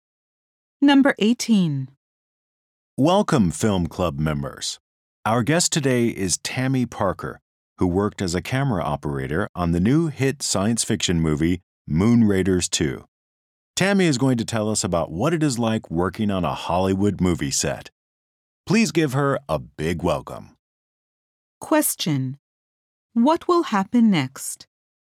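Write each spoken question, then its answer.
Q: What will happen next?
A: Tammy Parker will talk about working on a Hollywood movie set.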